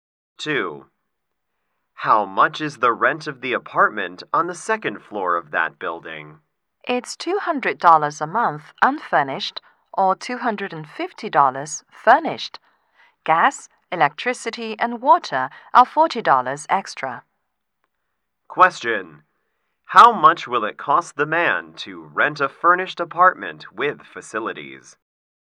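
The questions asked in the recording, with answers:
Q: How much will it cost the man to rent a furnished apartment with facilities?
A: $290 a month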